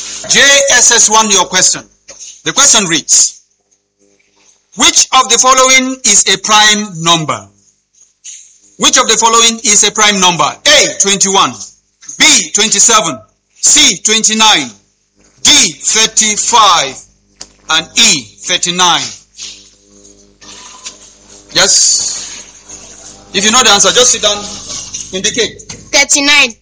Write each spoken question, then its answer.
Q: Which of the following is a prime number?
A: The answer is 29.